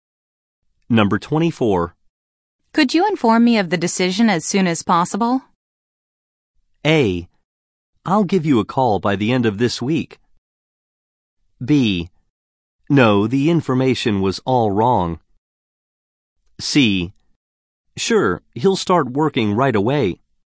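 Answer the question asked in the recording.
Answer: A: I'll give you a call by the end of this week.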